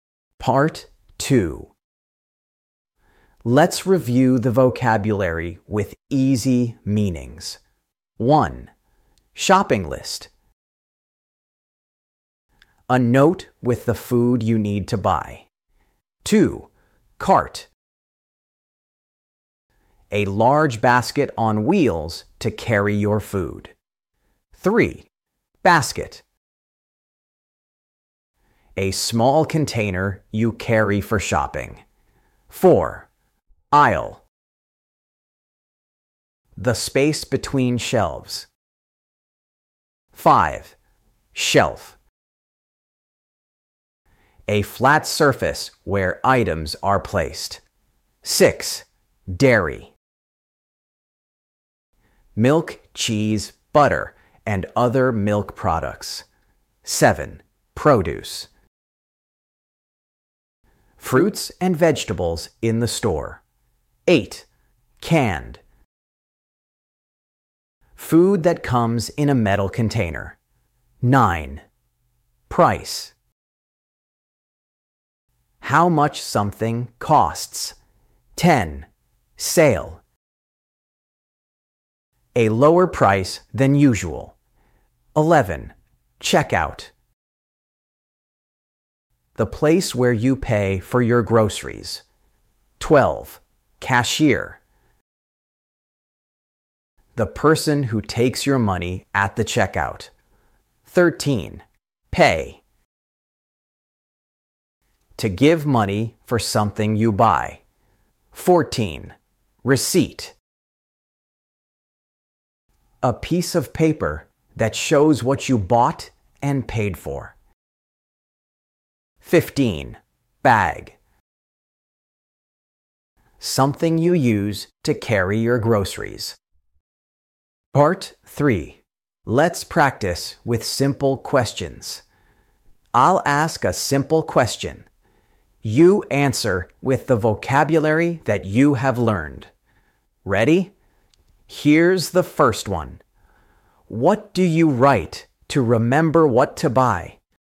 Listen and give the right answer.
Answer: Shopping list. Yes, a shopping list helps you plan before you go.